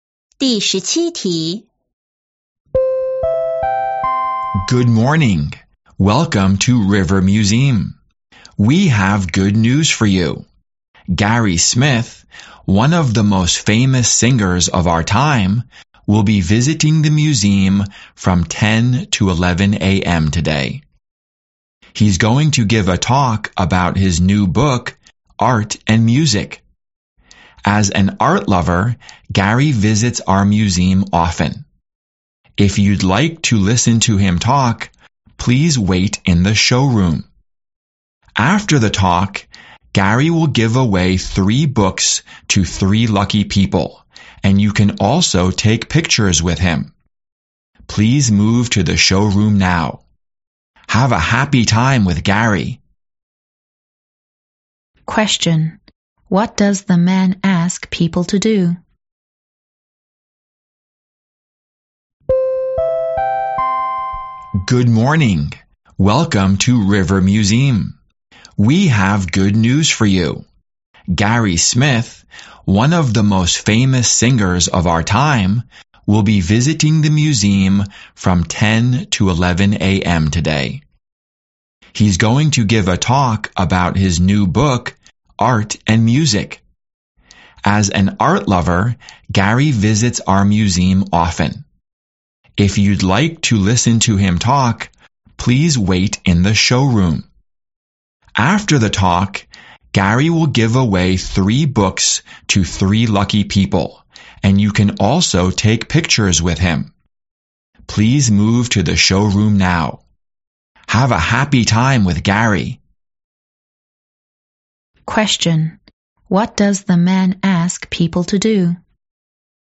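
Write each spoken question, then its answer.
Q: What does the man ask people to do?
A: Move to the showroom to listen to Gary's talk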